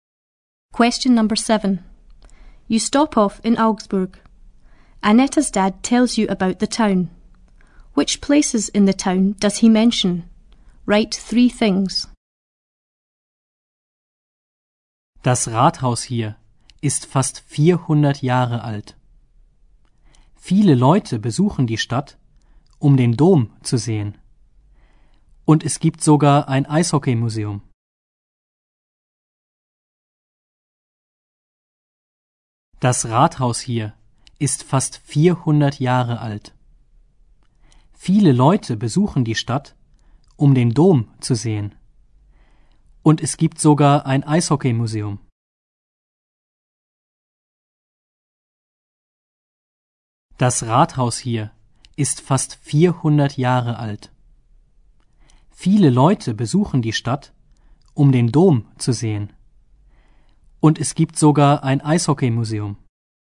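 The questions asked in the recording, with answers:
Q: Which places in the town does he mention?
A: Town hall; cathedral; ice hockey museum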